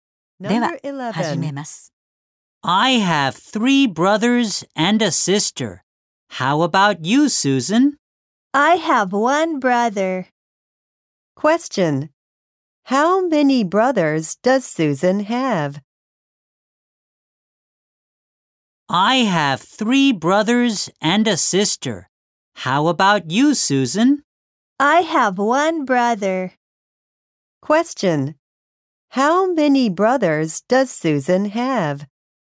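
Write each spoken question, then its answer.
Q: How many brothers does Susan have?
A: One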